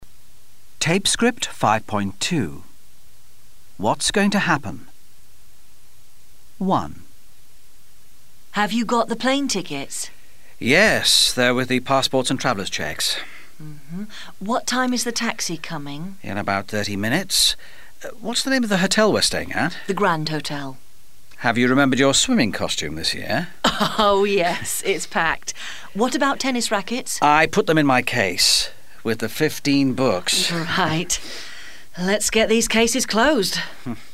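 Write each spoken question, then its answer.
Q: What's going to happen?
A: They're going on holiday.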